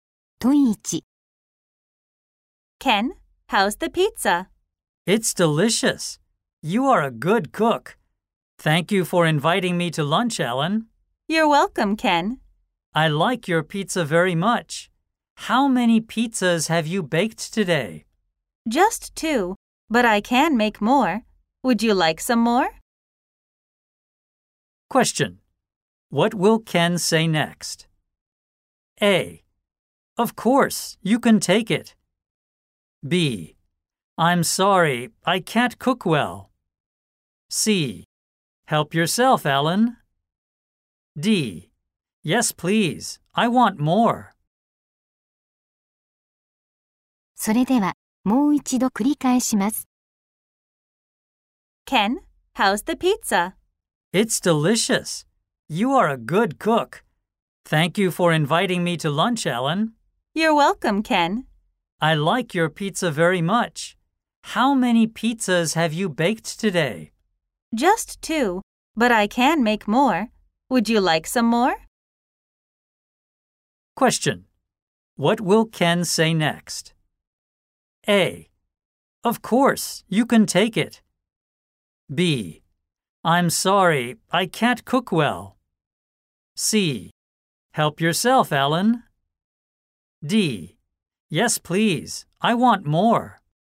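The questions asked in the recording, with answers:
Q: What will Ken say next?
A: D: Yes, please, I want more.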